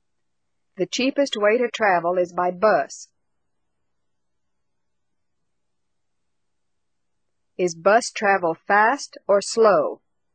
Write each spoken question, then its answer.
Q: Is bus travel fast or slow?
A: Bus travel is slow.